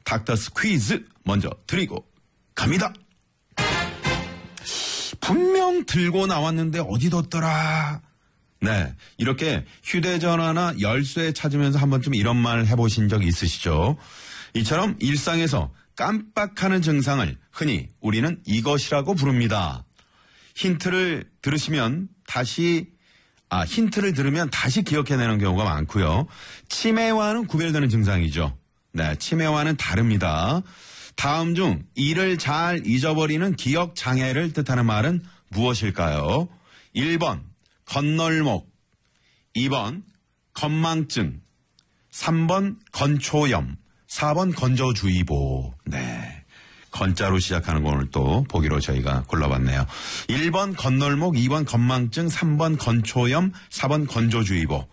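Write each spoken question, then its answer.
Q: 다음 중 이를 잘 잊어버리는 기억장애를 뜻하는 말은 무엇일까요?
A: 2: 건망증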